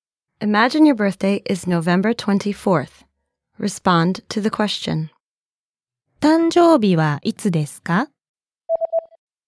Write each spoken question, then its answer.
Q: 誕生日はいつですか?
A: 11月24日です。